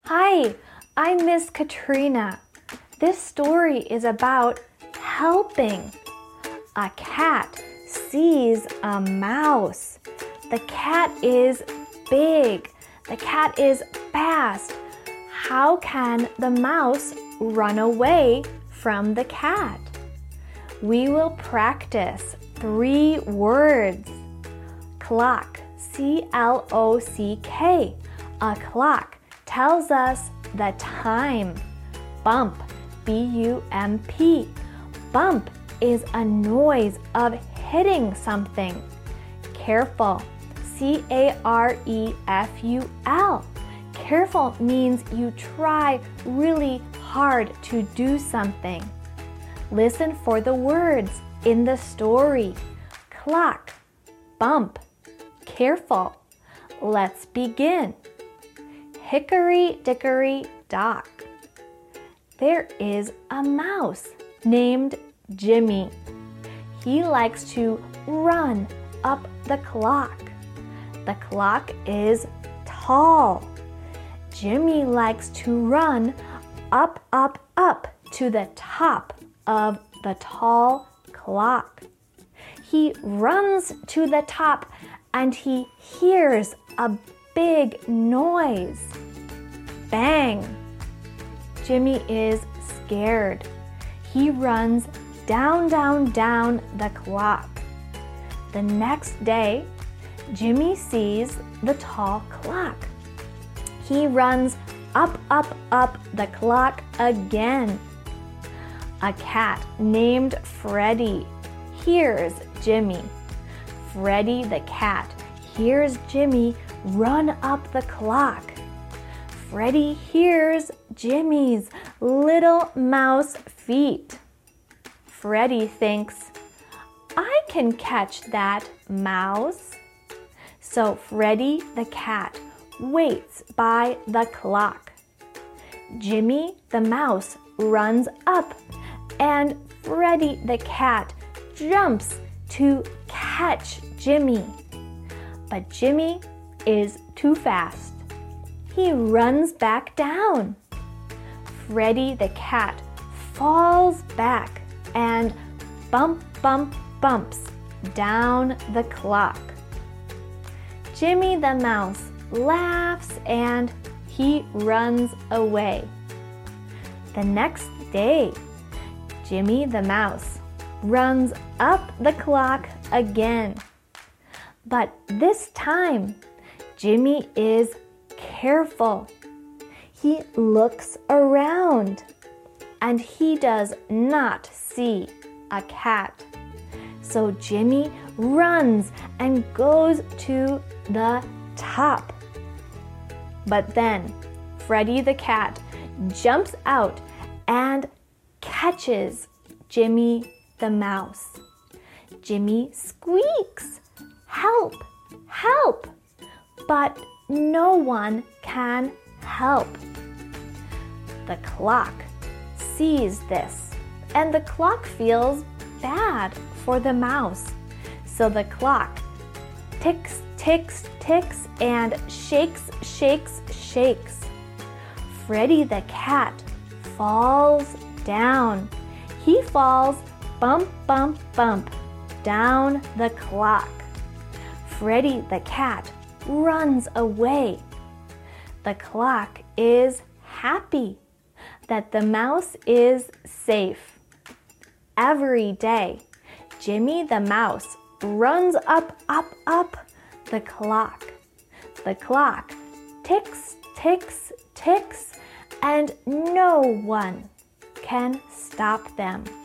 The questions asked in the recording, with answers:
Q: How can the mouse run away from the cat?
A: The cat catches the mouse, but the clock helps the mouse.